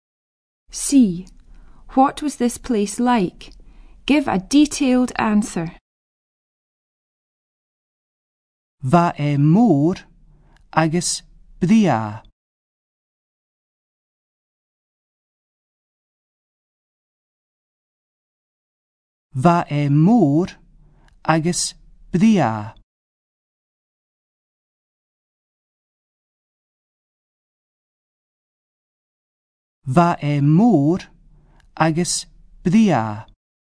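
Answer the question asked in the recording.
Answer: Big and beautiful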